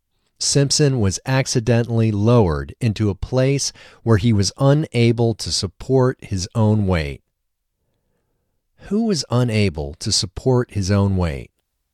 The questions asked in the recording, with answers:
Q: Who was unable to support his own weight?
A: Simpson was unable to support his own weight.